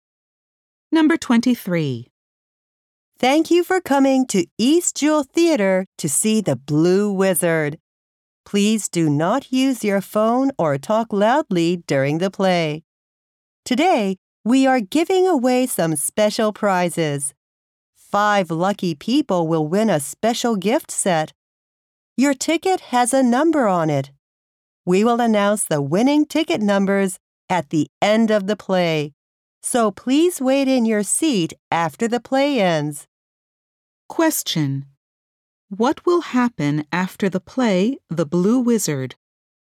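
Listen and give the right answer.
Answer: The winning ticket numbers for special prizes will be announced.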